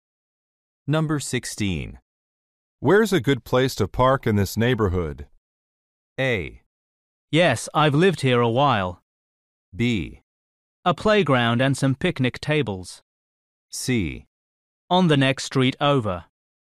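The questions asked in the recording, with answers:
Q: Where's a good place to park in this neighborhood?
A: C: On the next street over.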